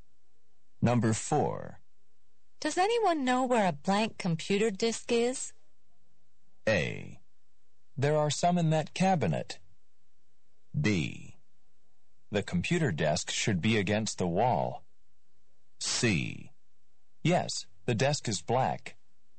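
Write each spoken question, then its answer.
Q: Does anyone know where a blank computer disk is?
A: A: There are some in that cabinet.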